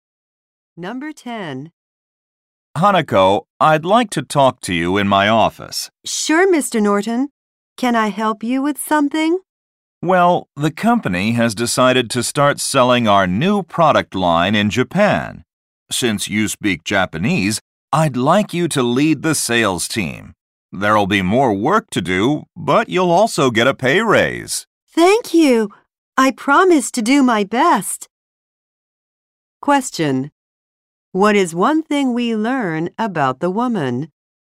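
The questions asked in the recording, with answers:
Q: What is one thing we learn about the woman?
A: She speaks Japanese and will lead the sales team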